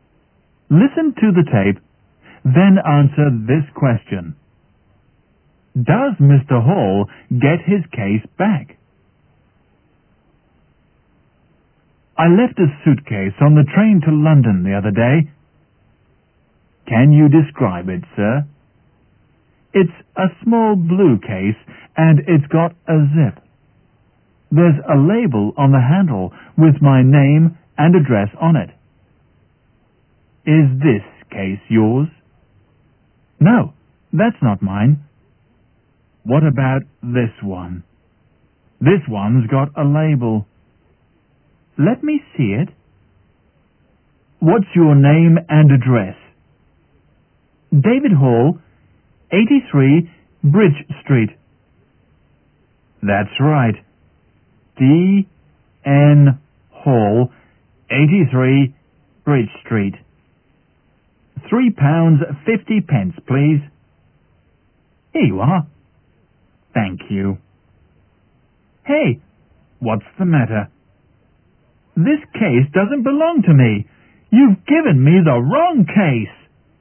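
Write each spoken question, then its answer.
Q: Does Mr. Hall get his case back?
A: No, he is given the wrong case.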